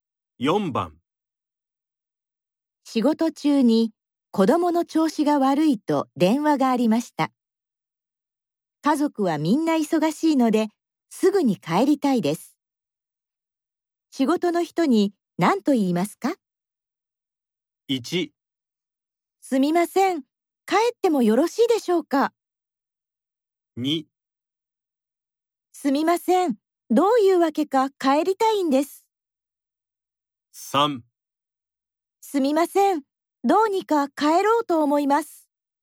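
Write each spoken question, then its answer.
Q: 仕事の人に何と言いますか?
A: 1: すみません、帰ってもよろしいでしょうか?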